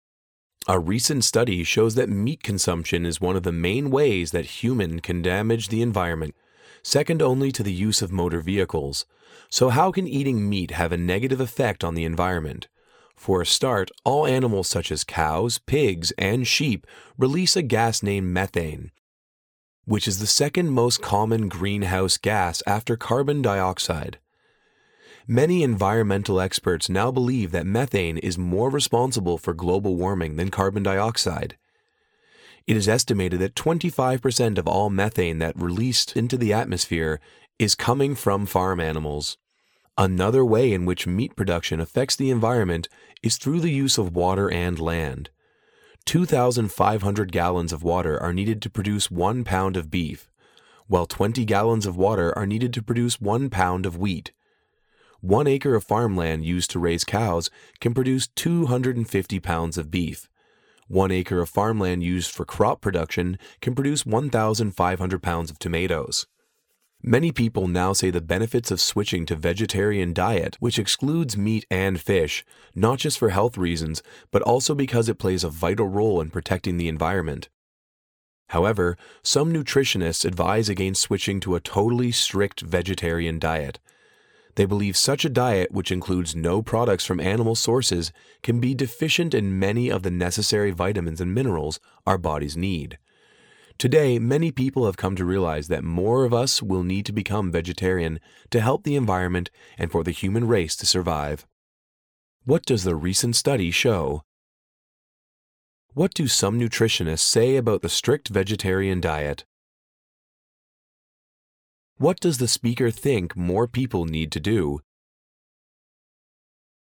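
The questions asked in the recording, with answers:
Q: What does the recent study show?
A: Eating meat is one of the main ways humans damage the environment, second only to using motor vehicles.

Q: What do some nutritionists say about the strict vegetarian diet?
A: It can lack many of the vitamins and minerals the body needs.

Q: What does the speaker think more people need to do?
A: Become vegetarian to help the environment.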